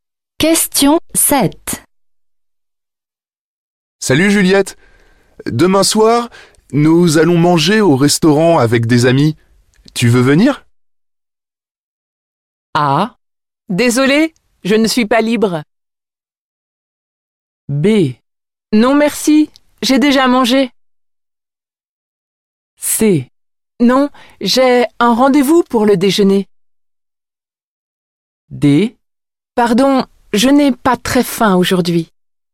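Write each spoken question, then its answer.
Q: Tu veux venir?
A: A: Désolée, je ne suis pas libre.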